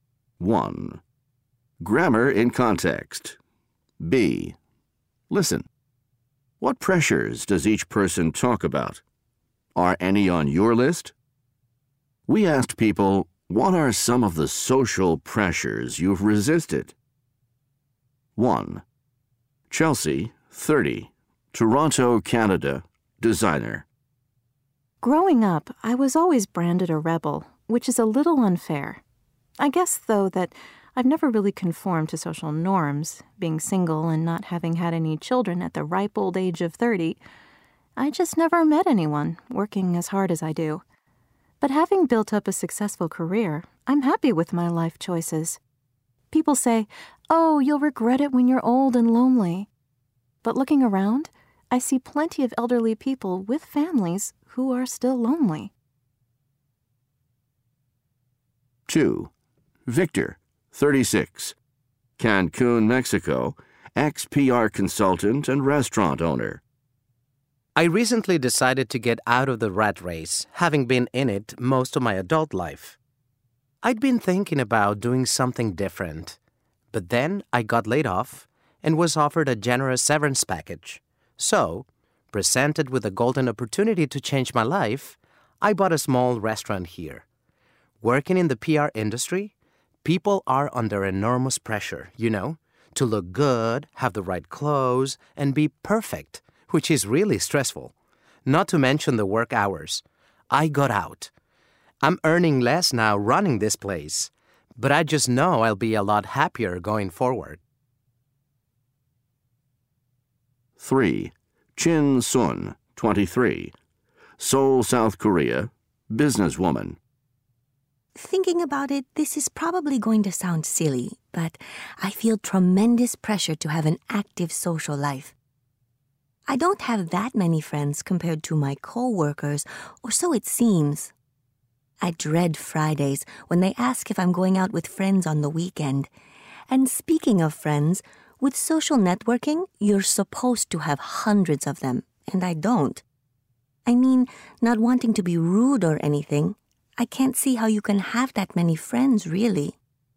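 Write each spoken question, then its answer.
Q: What pressures does each person talk about?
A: Chelsea: pressure to conform, get married and have children; Victor: pressure in PR to look good, wear the right clothes, be perfect, and work long hours; Chin Sun: pressure to have an active social life and many friends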